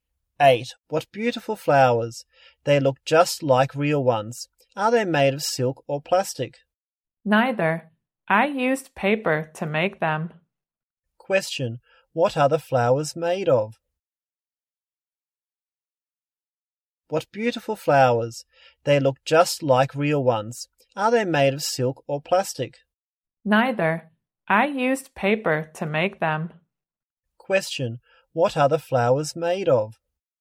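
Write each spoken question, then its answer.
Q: Question. What are the flowers made of?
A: Paper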